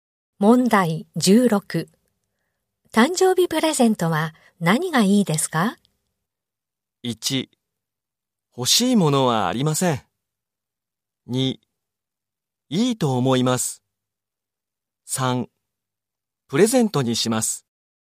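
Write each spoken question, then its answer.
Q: 誕生日プレゼントは何がいいですか?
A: 1: 欲しいものはありません。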